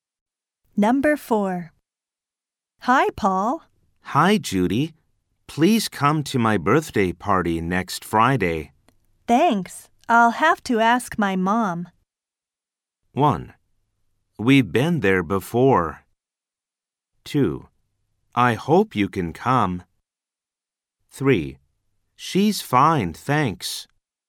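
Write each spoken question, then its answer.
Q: Thanks. I'll have to ask my mom.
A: 2: I hope you can come.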